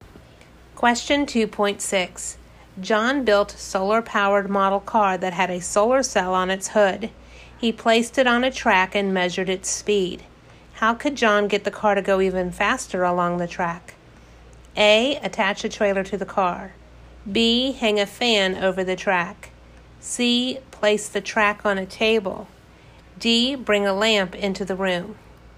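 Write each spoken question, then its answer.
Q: How could John get the car to go even faster along the track?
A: D: Bring a lamp into the room.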